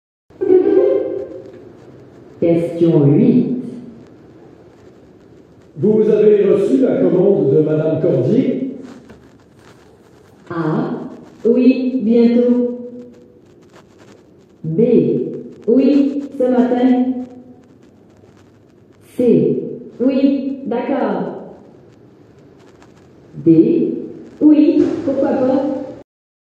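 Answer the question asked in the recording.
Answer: B: Oui, ce matin.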